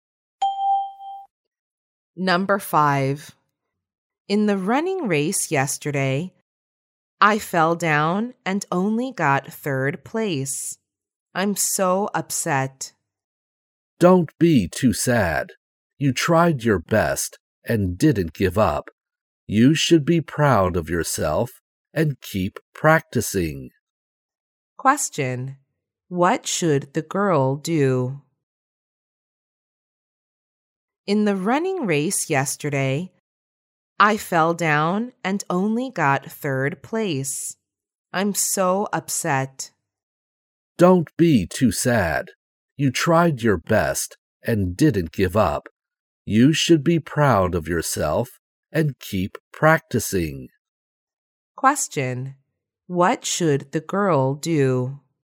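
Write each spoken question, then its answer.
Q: What should the girl do?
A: Be proud of herself and keep practicing.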